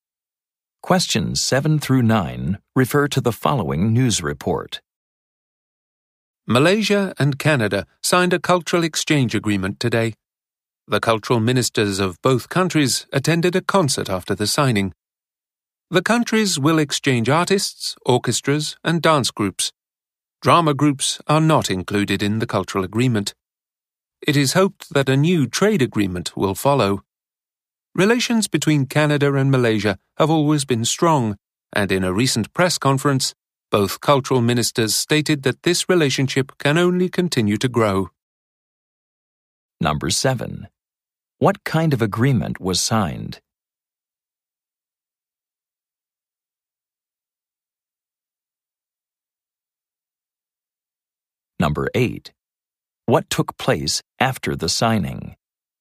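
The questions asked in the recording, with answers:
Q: What kind of agreement was signed?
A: A cultural exchange agreement

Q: What took place after the signing?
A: A concert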